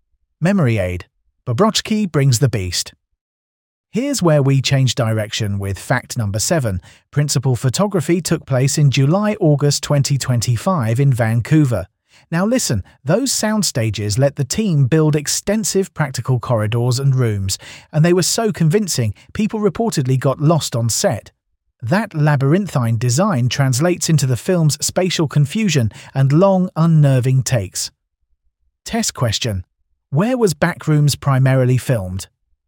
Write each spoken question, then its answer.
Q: Where was Backrooms primarily filmed?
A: Vancouver.